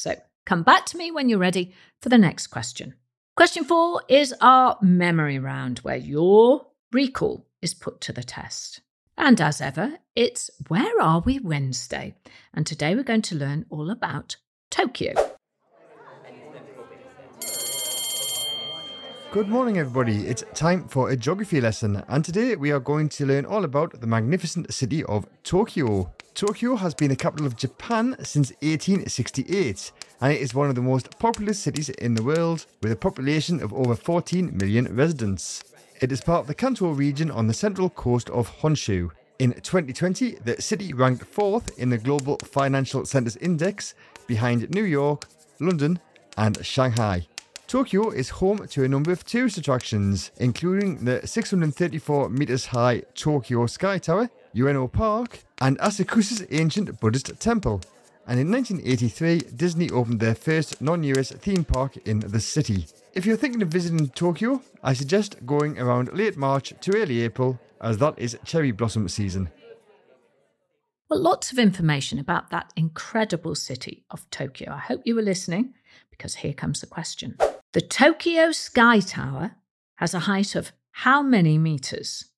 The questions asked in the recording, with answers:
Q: The Tokyo Sky Tower has a height of how many meters?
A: The answer was 634 metres.